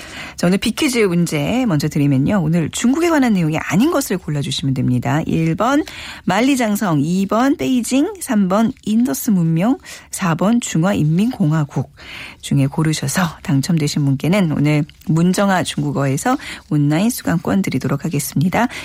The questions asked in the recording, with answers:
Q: 오늘 중국에 관한 내용이 아닌 것을 골라주시면 됩니다.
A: 오늘 예 정답 3번 인더스 문명은 중국 관련이 없자